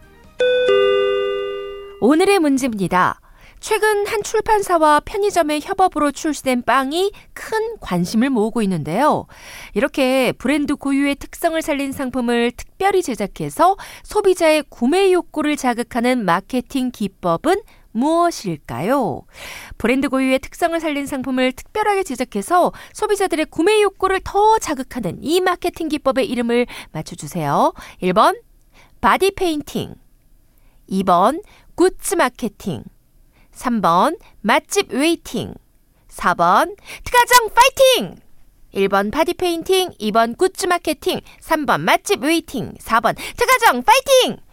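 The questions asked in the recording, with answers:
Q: 브랜드 고유의 특성을 살린 상품을 특별하게 제작해서 소비자들의 구매 욕구를 더 자극하는 이 마케팅 기법의 이름을 맞춰주세요.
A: 2: 굿즈 마케팅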